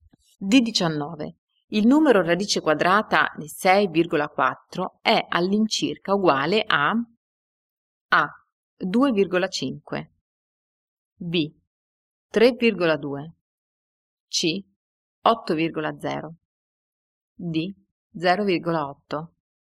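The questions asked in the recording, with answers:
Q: Il numero radice quadrata di 6,4 è all'incirca uguale a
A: A: 2,5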